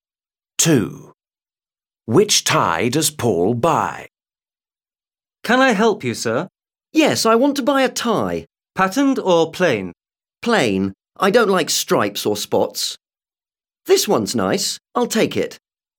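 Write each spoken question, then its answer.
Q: Which tie does Paul buy?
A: A plain tie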